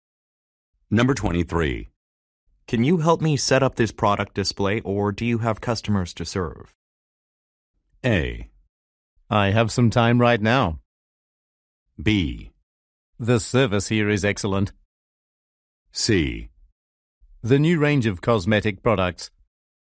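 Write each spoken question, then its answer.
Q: Can you help me set up this product display, or do you have customers to serve?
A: A: I have some time right now.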